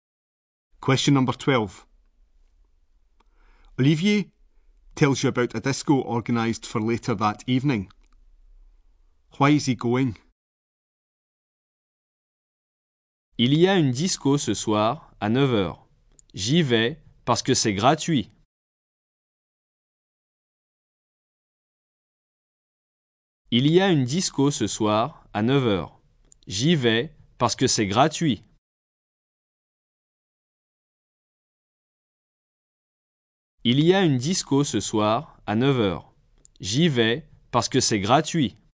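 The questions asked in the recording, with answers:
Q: Why is he going?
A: Because it's free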